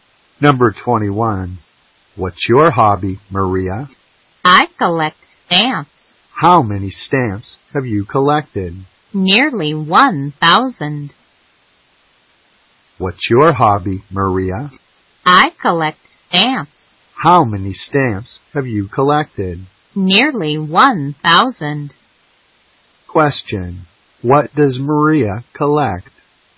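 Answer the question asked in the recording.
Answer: Stamps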